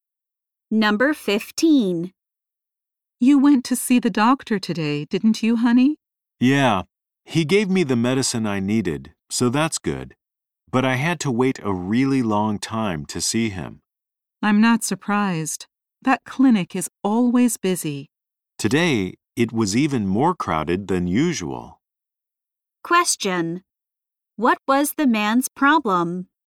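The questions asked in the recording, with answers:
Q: What was the man's problem?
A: He had to wait a long time to see the doctor.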